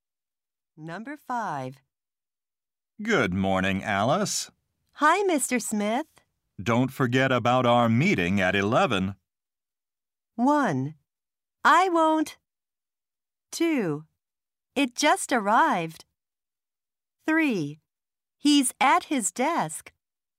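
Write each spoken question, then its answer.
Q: Don't forget about our meeting at 11.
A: 1: I won't.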